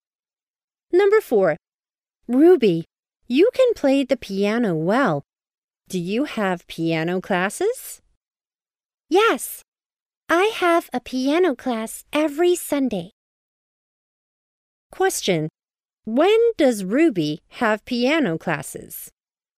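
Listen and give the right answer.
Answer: Every Sunday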